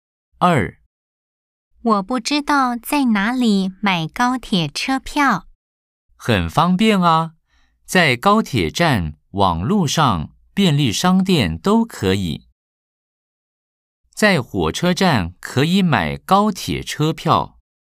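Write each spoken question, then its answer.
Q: 在火车站可以买高铁车票。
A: X (错)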